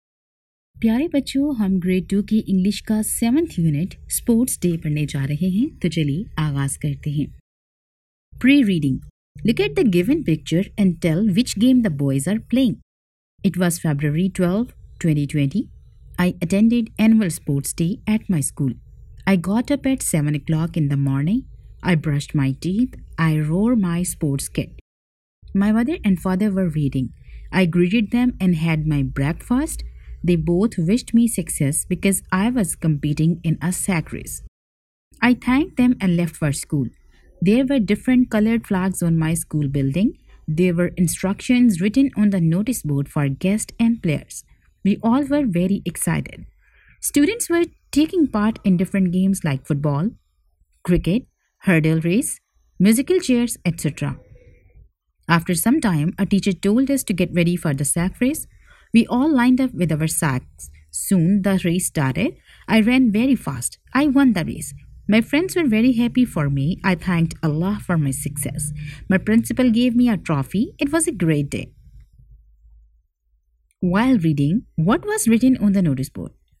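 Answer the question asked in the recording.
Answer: Instructions for guests and players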